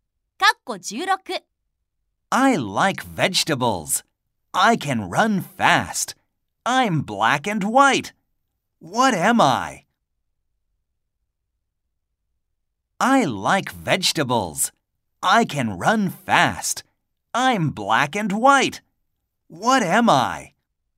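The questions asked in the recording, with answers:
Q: I like vegetables. I can run fast. I'm black and white. What am I?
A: A zebra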